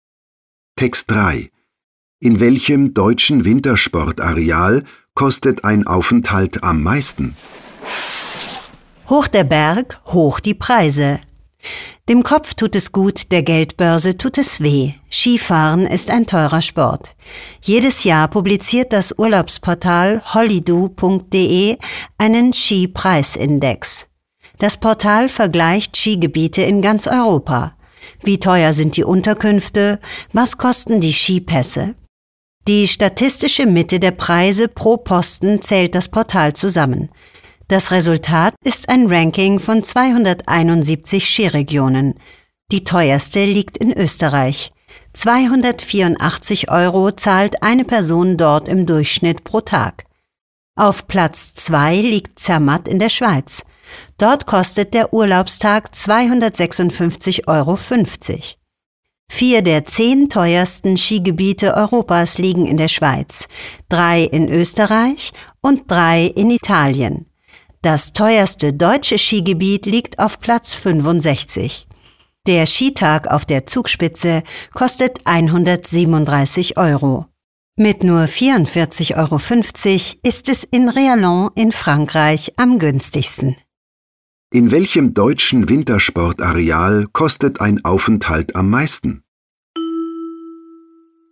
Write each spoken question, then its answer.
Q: In welchem deutschen Wintersportareal kostet ein Aufenthalt am meisten?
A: Der Skitag auf der Zugspitze kostet 137 Euro.